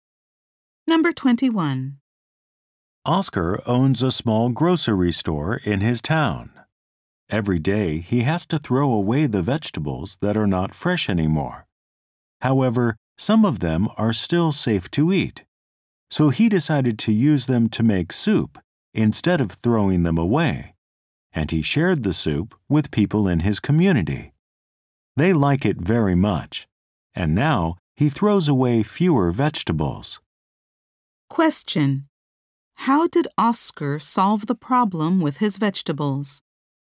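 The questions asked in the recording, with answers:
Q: How did Oscar solve the problem with his vegetables?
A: He made soup with them and shared it.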